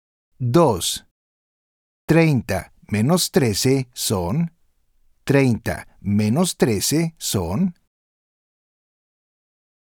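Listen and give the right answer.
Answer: 17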